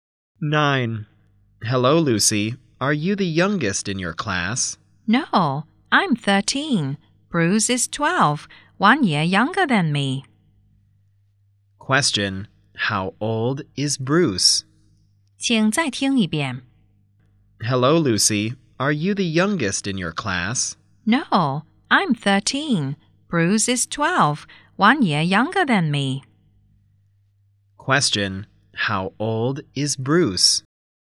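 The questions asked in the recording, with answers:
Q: How old is Bruce?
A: 12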